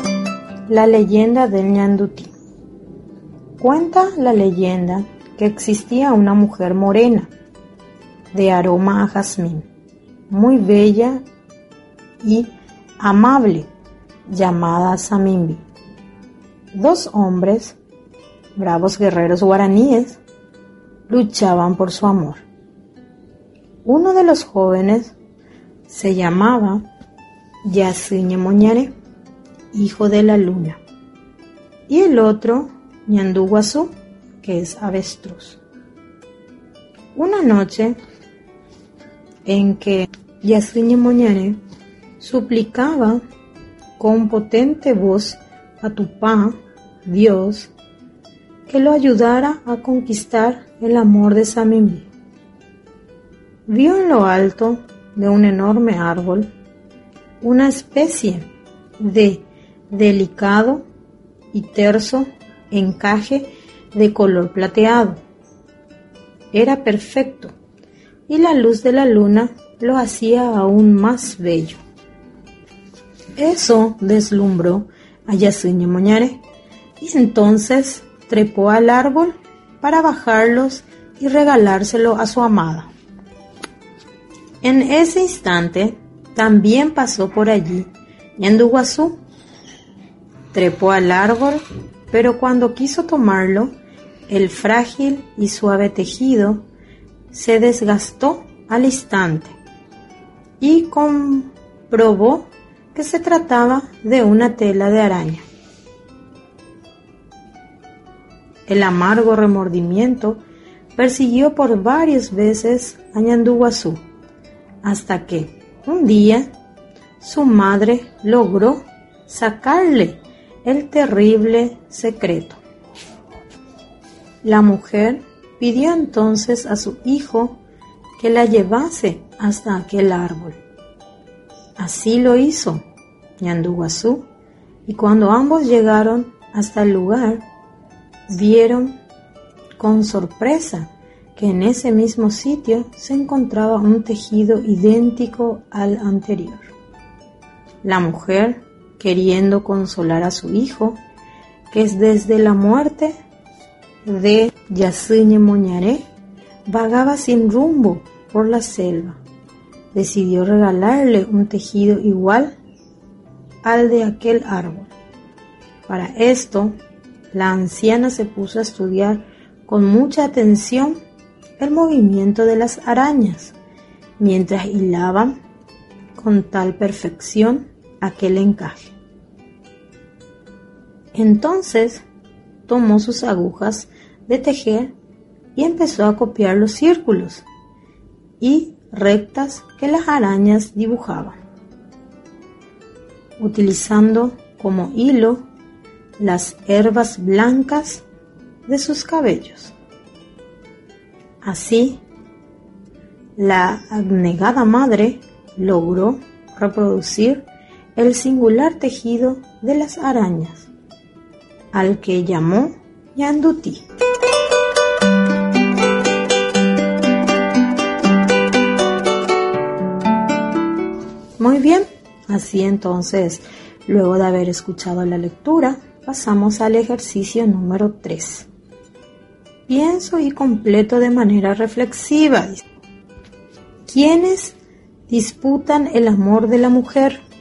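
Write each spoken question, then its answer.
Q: ¿Quiénes disputan el amor de la mujer?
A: Dos guerreros guaraníes: Yasuñe Moñare y Ñanduguazú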